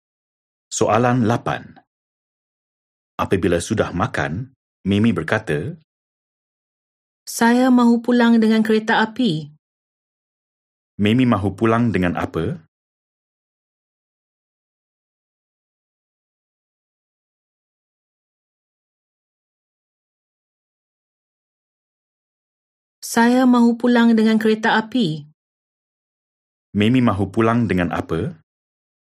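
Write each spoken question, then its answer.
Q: Mimi mahu pulang dengan apa?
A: kereta api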